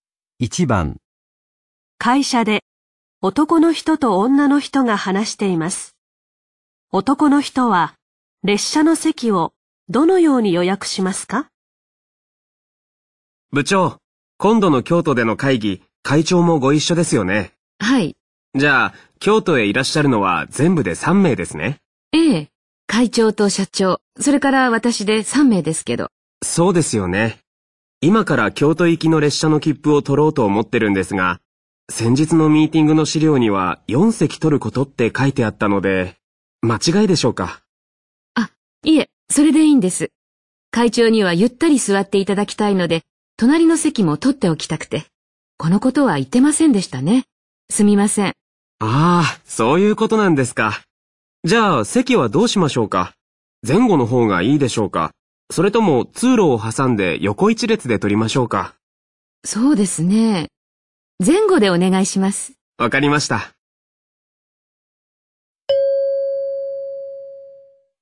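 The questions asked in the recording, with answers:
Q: 男の人は列車の席をどのように予約しますか?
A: 会長の隣の席も含めて4席を前後で取る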